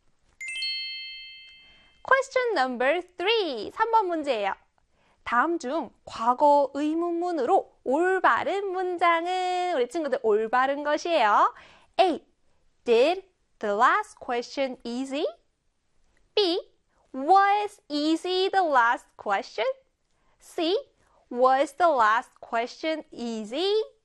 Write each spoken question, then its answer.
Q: 다음 중 과거 의문문으로 올바른 문장은 우리 친구들 올바른 것이에요.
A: 정답은요? 그렇죠. C의 was the last question easy?